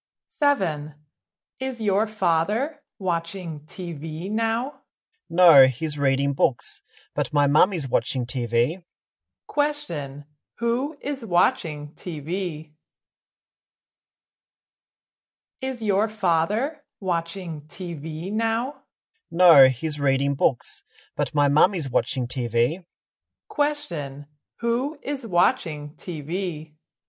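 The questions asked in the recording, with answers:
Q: who is watching TV?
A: His mum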